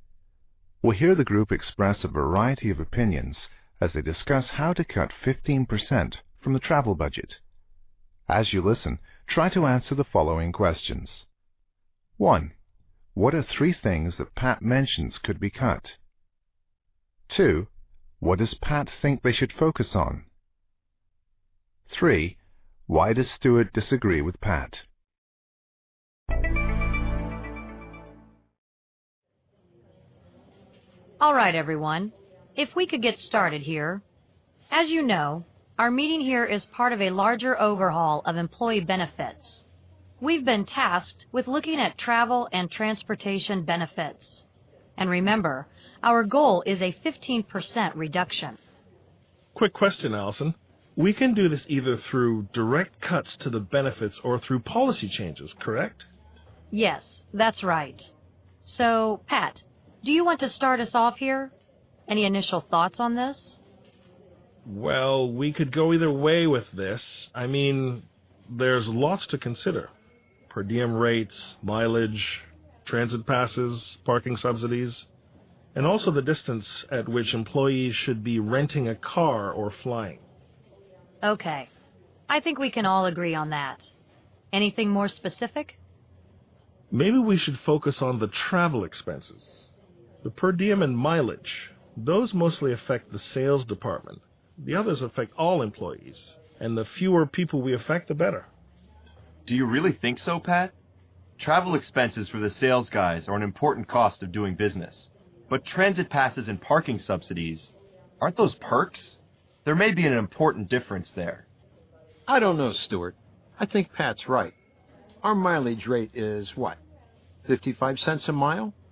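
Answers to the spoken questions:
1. Any three of: per diem rates, mileage, transit passes, parking subsidies, and the distance at which employees should rent a car or fly
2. Travel expenses (per diem and mileage), which mostly affect the sales department
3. Travel expenses for salespeople are an important cost of doing business, while transit passes and parking subsidies are perks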